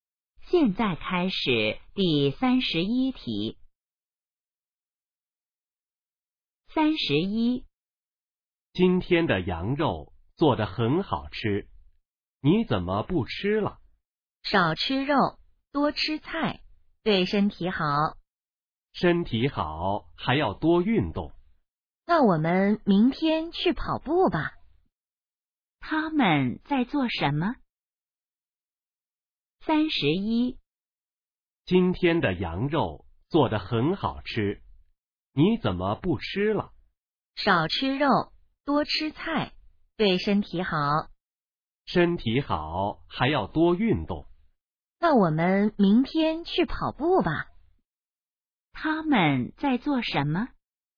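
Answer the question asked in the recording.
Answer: 吃饭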